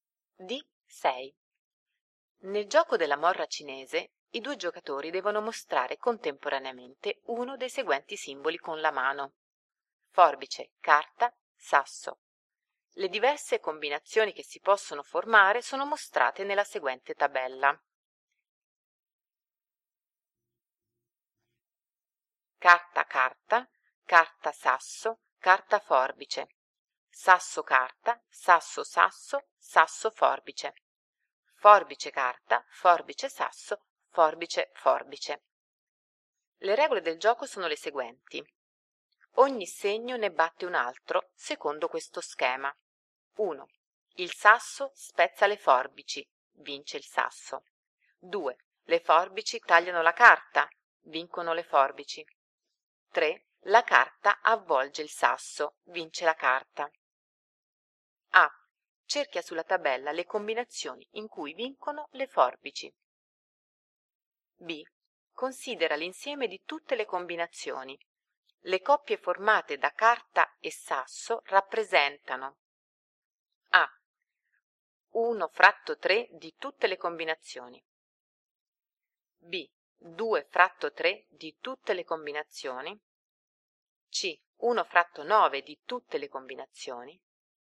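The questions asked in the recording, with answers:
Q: Le coppie formate da carta e sasso rappresentano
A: D: 2 fratto 9 di tutte le combinazioni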